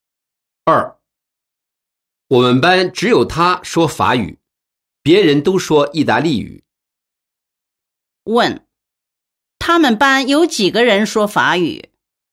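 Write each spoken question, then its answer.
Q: 他们班有几个人说法语?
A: 一个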